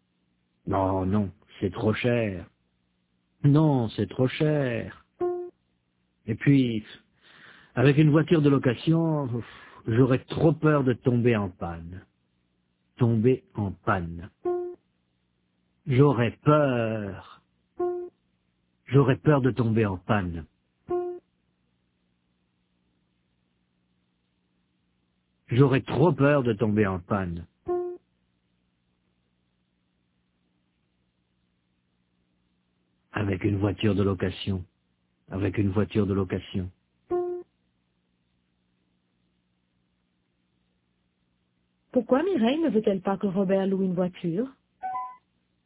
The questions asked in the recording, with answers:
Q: Pourquoi Mireille ne veut-elle pas que Robert loue une voiture?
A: Parce que c'est trop cher et puis qu'elle aurait trop peur de tomber en panne.